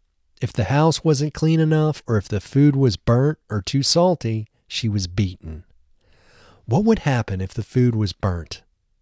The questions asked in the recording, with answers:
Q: What would happen if the food was burnt?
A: If the food was burnt, she was beaten.